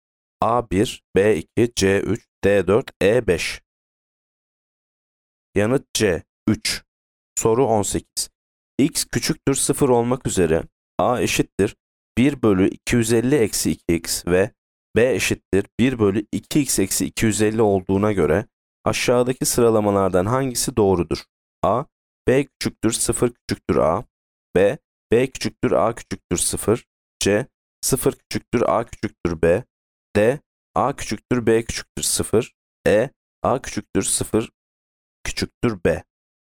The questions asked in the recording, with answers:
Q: X küçüktür 0 olmak üzere A eşittir 1 bölü 250 eksi 2x ve B eşittir 1 bölü 2x eksi 250 olduğuna göre aşağıdaki sıralamalardan hangisi doğrudur?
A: Yanıt A. B küçüktür 0 küçüktür A.